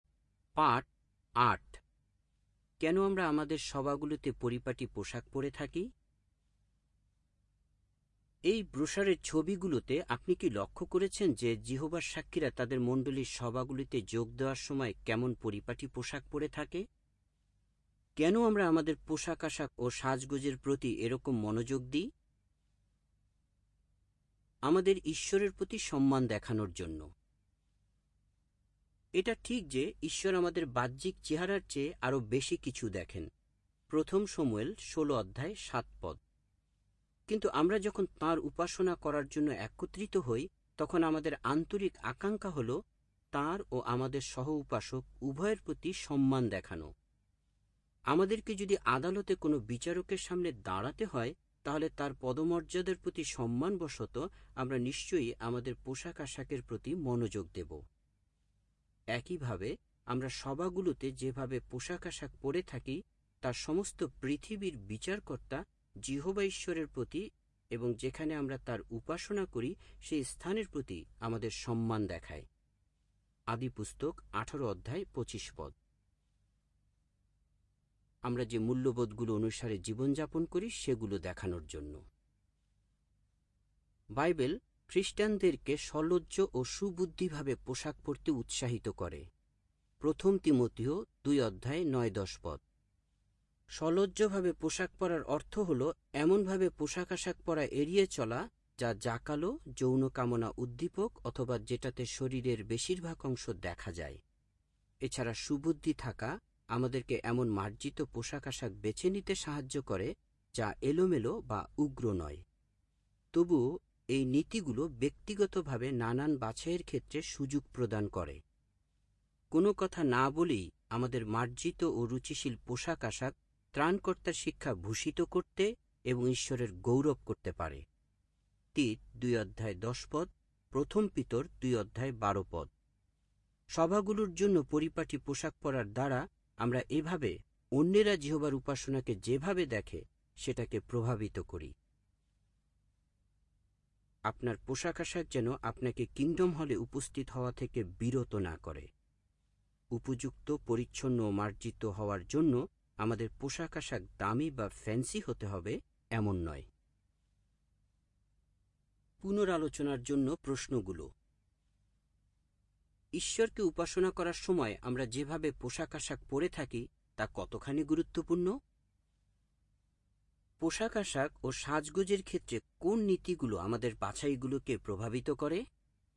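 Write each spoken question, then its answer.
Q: ঈশ্বরকে উপাসনা করার সময় আমরা যেভাবে পোশাক আশাক পরে থাকি তা কতখানি গুরুত্বপূর্ণ?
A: খুবই গুরুত্বপূর্ণ; এটা যিহোবা ঈশ্বর, সহ উপাসক ও উপাসনার স্থানের প্রতি সম্মান দেখায়

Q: পোশাক আশাক ও সাজগোজের ক্ষেত্রে কোন নীতিগুলো আমাদের বাছাইগুলোকে প্রভাবিত করে?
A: সলজ্জভাবে ও সুবুদ্ধির সঙ্গে মার্জিত পোশাক পরা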